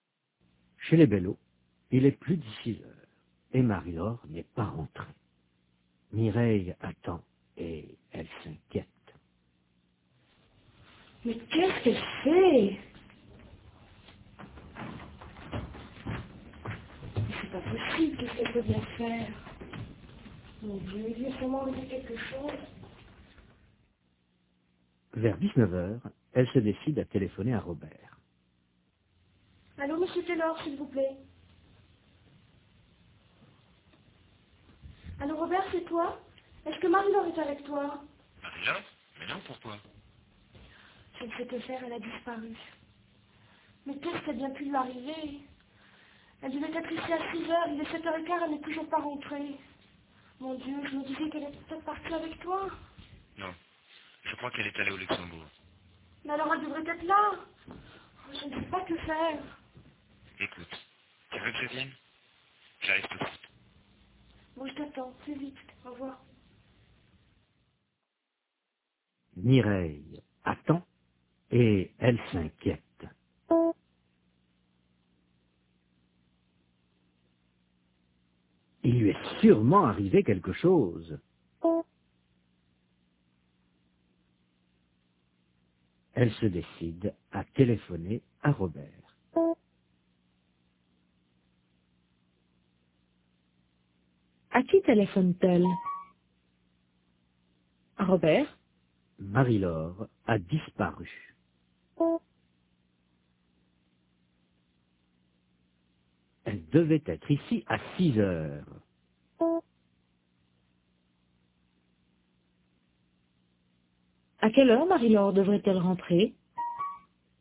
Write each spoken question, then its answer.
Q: À quelle heure Marie-Laure devrait-elle rentrer?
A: À 6h.